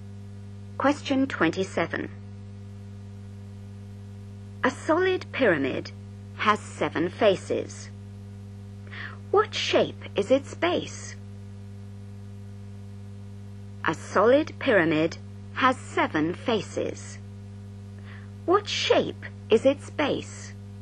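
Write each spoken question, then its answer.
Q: What shape is its base?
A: hexagon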